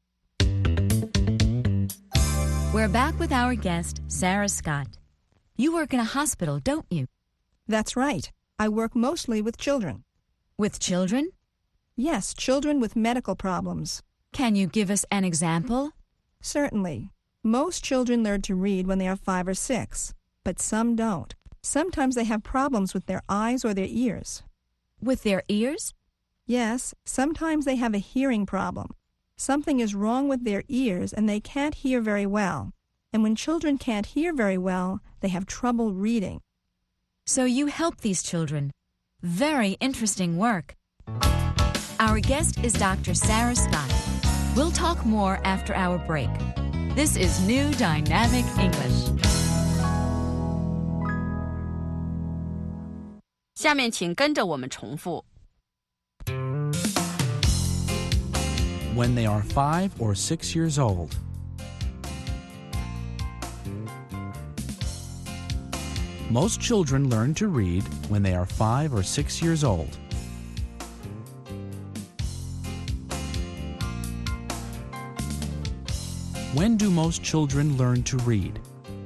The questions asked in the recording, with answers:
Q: When do most children learn to read?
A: Most children learn to read when they are 5 or 6 years old.